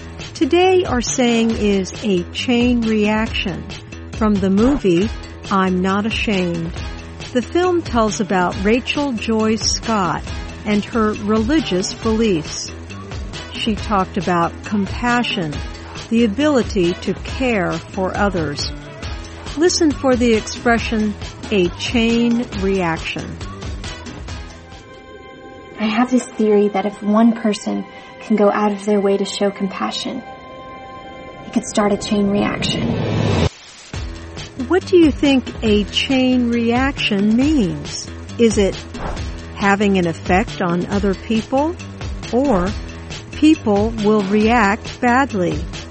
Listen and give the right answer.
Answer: A chain reaction means having an effect on other people.